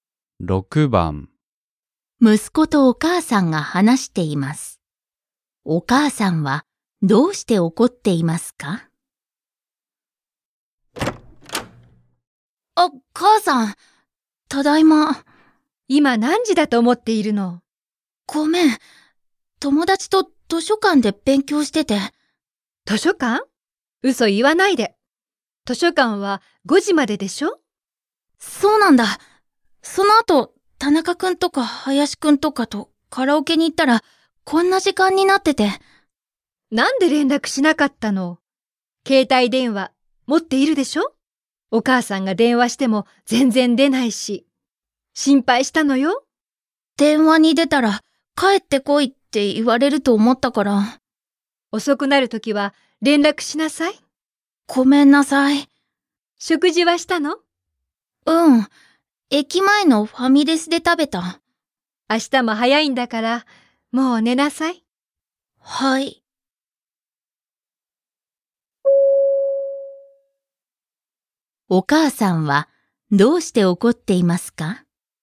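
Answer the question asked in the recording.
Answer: 息子が遅く帰ってきたのに連絡しなかったから(電話にも出なかった)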